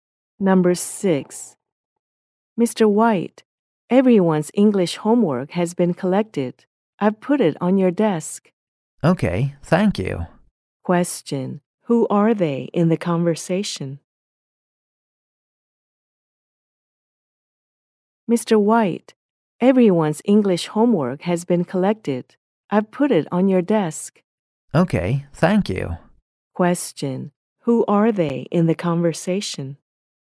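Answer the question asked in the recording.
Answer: A teacher and a student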